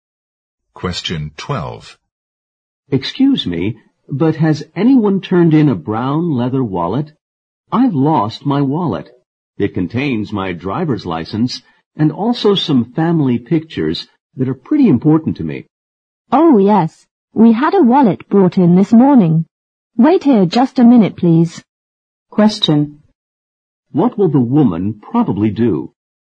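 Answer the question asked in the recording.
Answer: Go and get the wallet that was turned in this morning.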